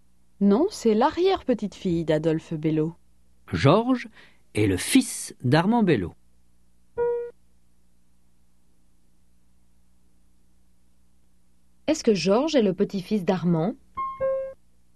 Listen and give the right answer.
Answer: Non, Georges est le fils d'Armand.